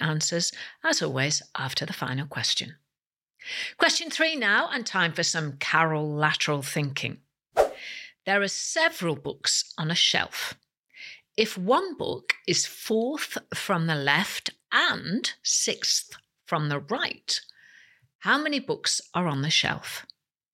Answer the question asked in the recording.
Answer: And the answer is there are 9 books on the shelf.